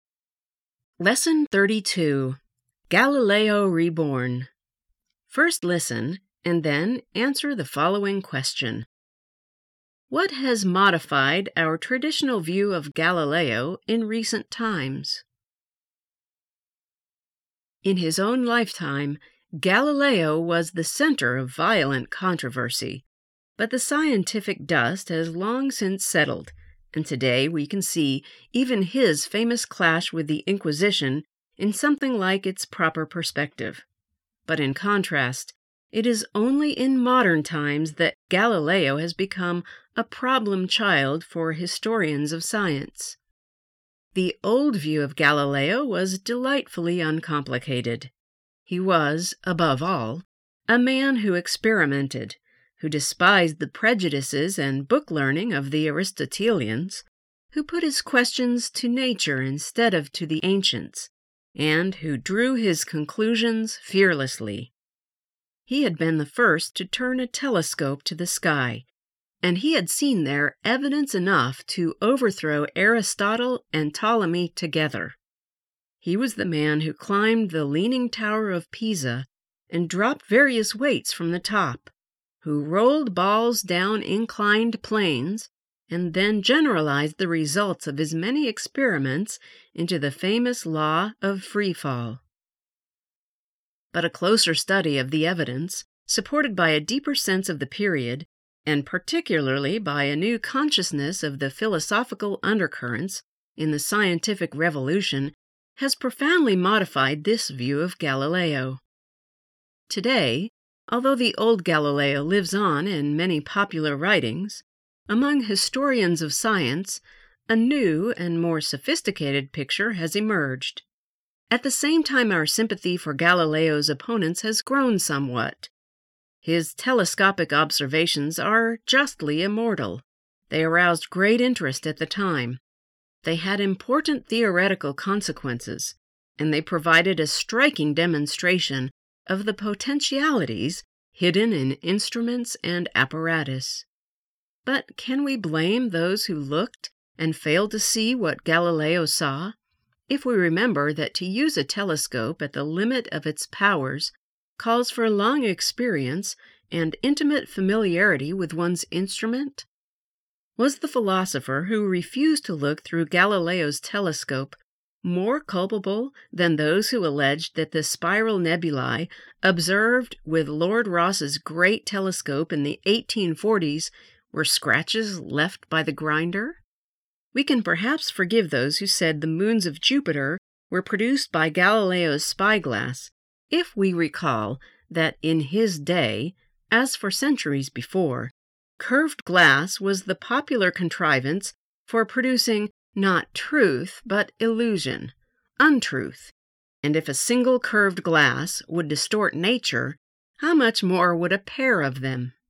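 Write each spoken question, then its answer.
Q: What has modified our traditional view of Galileo in recent times?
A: A closer study of the evidence, a deeper sense of the period, and a new awareness of the philosophical undercurrents in the scientific revolution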